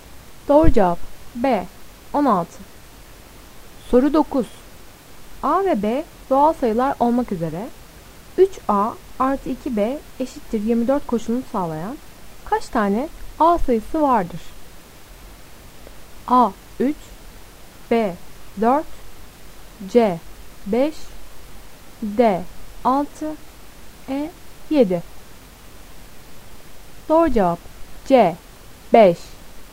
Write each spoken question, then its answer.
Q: A ve B doğal sayılar olmak üzere 3A artı 2B eşittir 24 koşulunu sağlayan kaç tane A sayısı vardır?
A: Doğru cevap C 5.